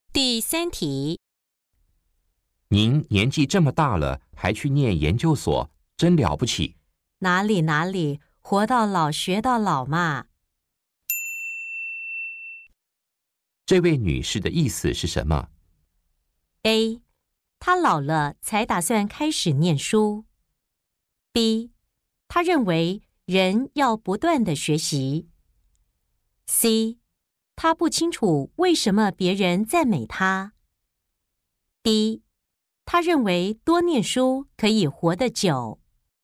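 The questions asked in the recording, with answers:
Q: 这位女士的意思是什么?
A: B: 她认为人要不断的学习。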